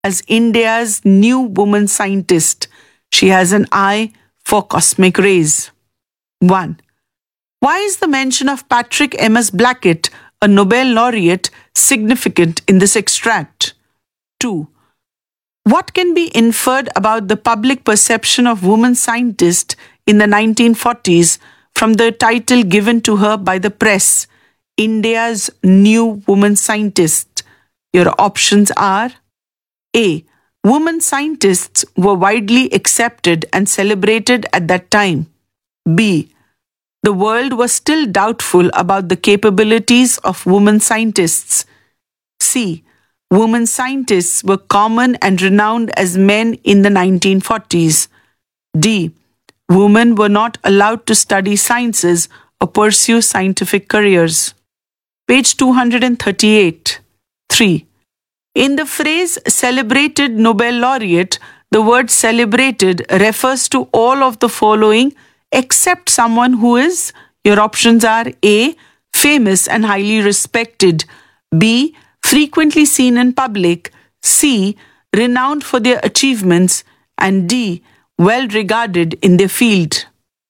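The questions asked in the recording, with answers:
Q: In the phrase celebrated Nobel laureate, the word celebrated refers to all of the following except someone who is.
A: B: Frequently seen in public.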